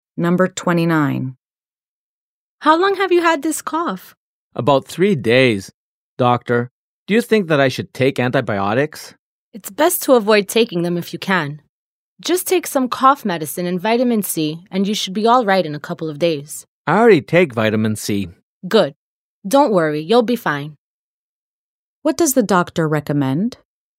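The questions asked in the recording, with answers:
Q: What does the doctor recommend?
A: Cough medicine and vitamin C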